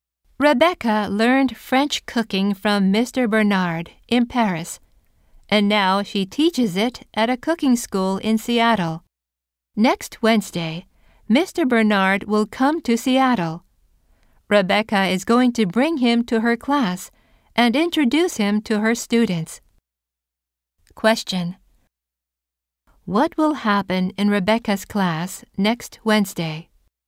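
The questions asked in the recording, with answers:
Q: What will happen in Rebecca's class next Wednesday?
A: Mr. Bernard will visit and meet the students.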